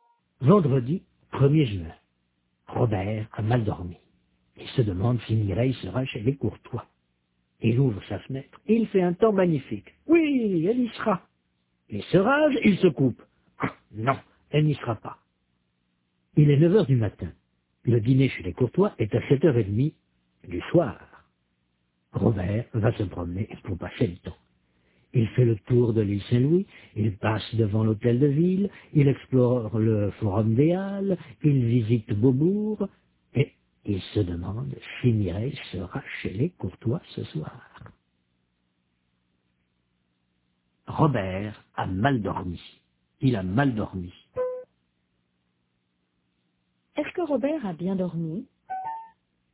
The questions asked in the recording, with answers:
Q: Est-ce que Robert a bien dormi?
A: Non, il a mal dormi.